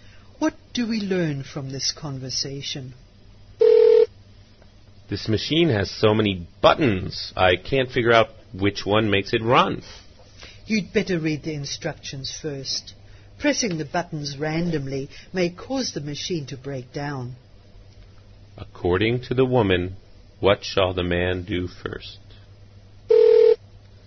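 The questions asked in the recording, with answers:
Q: According to the woman, what shall the man do first?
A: Read the instructions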